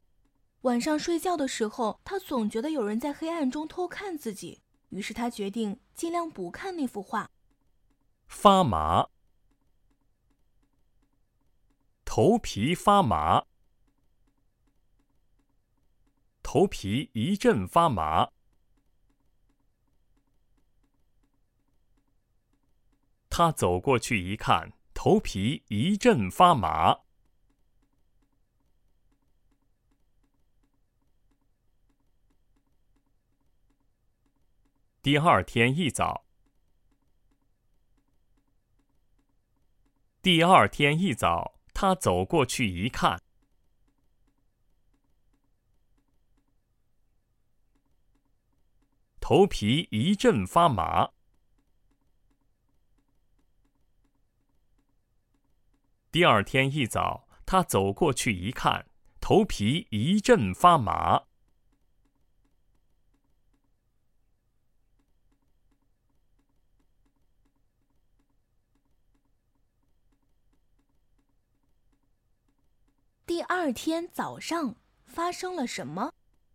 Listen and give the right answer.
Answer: 第二天一早,他走过去一看,头皮一阵发麻。